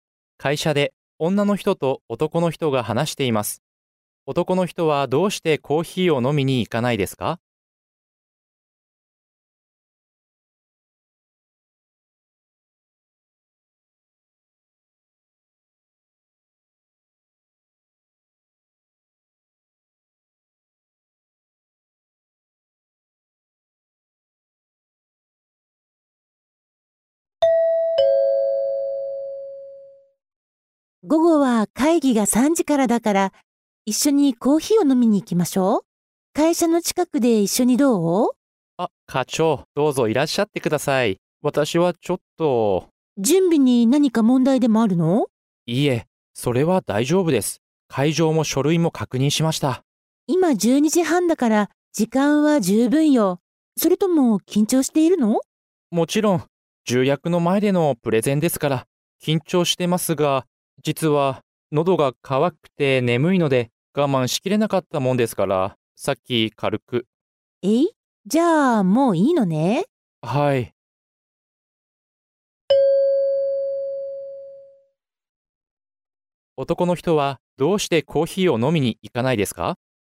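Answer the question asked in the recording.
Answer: さっきもうコーヒーを少し飲んだから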